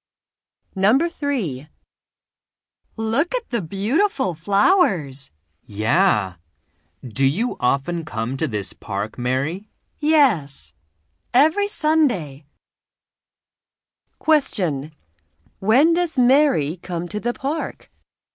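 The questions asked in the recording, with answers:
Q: When does Mary come to the park?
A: Every Sunday.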